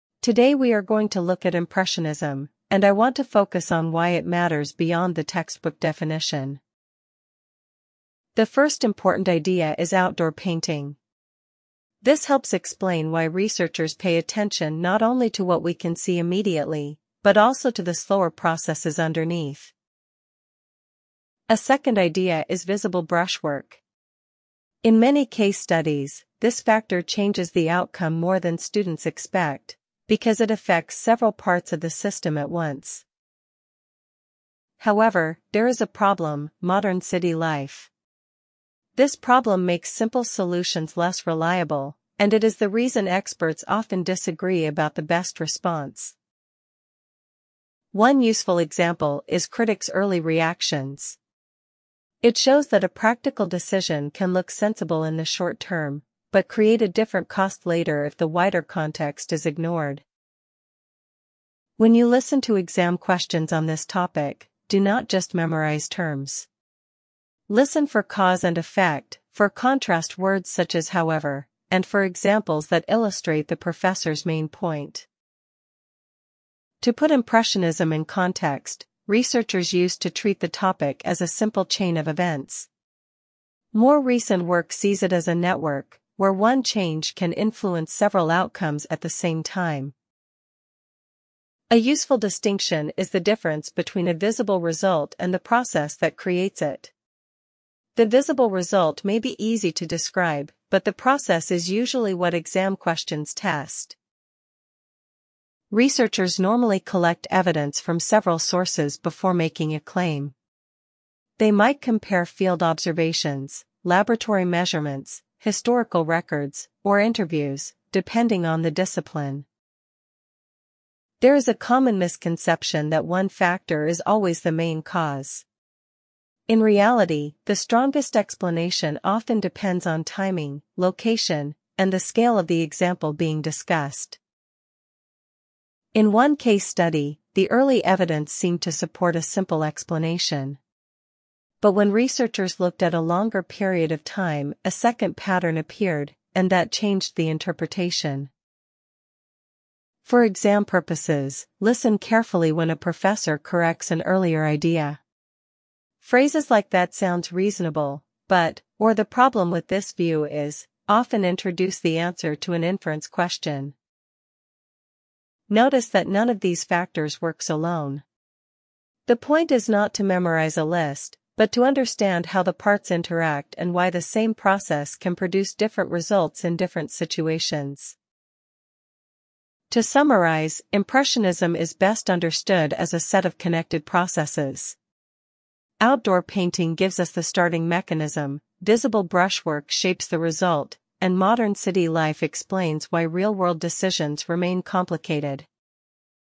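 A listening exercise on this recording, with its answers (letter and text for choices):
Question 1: What is the lecture mainly about?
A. Impressionism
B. A student housing policy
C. A library rule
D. A language placement test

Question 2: What is the first important idea?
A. Outdoor painting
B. Visible brushwork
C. Modern city life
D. Critics' early reactions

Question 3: What is the second idea discussed?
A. Critics' early reactions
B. Campus funding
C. Visible brushwork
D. Exam registration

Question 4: Why is the issue complicated?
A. It makes simple solutions less reliable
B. It has no examples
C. It is only historical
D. It is unrelated to practice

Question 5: What does the example show?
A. Short-term decisions can have later costs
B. Definitions are never useful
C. Students should avoid examples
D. The topic is solved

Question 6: What should listeners pay attention to in exam questions?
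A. Only names and dates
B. Cause, effect, contrast words, and examples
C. Spelling rules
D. The professor's accent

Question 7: How does the professor summarise the topic?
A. As one simple rule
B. As connected processes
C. As a personal opinion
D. As an administrative problem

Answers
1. A. Impressionism
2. A. Outdoor painting
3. C. Visible brushwork
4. A. It makes simple solutions less reliable
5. A. Short-term decisions can have later costs
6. B. Cause, effect, contrast words, and examples
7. B. As connected processes

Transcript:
Today we are going to look at Impressionism, and I want to focus on why it matters beyond the textbook definition.
The first important idea is outdoor painting. This helps explain why researchers pay attention not only to what we can see immediately, but also to the slower processes underneath.
A second idea is visible brushwork. In many case studies, this factor changes the outcome more than students expect, because it affects several parts of the system at once.
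However, there is a problem: modern city life. This problem makes simple solutions less reliable, and it is the reason experts often disagree about the best response.
One useful example is critics' early reactions. It shows that a practical decision can look sensible in the short term, but create a different cost later if the wider context is ignored.
When you listen to exam questions on this topic, do not just memorise terms. Listen for cause and effect, for contrast words such as however, and for examples that illustrate the professor's main point.
To put Impressionism in context, researchers used to treat the topic as a simple chain of events. More recent work sees it as a network, where one change can influence several outcomes at the same time.
A useful distinction is the difference between a visible result and the process that creates it. The visible result may be easy to describe, but the process is usually what exam questions test.
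Researchers normally collect evidence from several sources before making a claim. They might compare field observations, laboratory measurements, historical records, or interviews, depending on the discipline.
There is a common misconception that one factor is always the main cause. In reality, the strongest explanation often depends on timing, location, and the scale of the example being discussed.
In one case study, the early evidence seemed to support a simple explanation. But when researchers looked at a longer period of time, a second pattern appeared, and that changed the interpretation.
For exam purposes, listen carefully when a professor corrects an earlier idea. Phrases like that sounds reasonable, but, or the problem with this view is, often introduce the answer to an inference question.
Notice that none of these factors works alone. The point is not to memorise a list, but to understand how the parts interact and why the same process can produce different results in different situations.
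To summarise, Impressionism is best understood as a set of connected processes. Outdoor painting gives us the starting mechanism, visible brushwork shapes the result, and modern city life explains why real-world decisions remain complicated.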